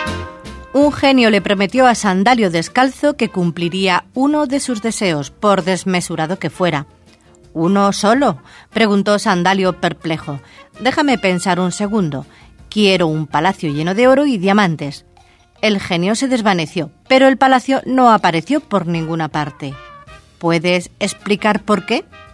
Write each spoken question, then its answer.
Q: ¿Puedes explicar por qué?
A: Solución, porque el genio ya había cumplido el primer deseo de Sandalio, dejarle pensar un segundo.